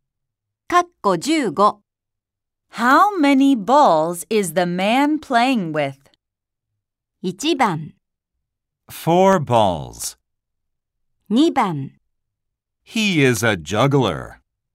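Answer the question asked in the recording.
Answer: 1: 4 balls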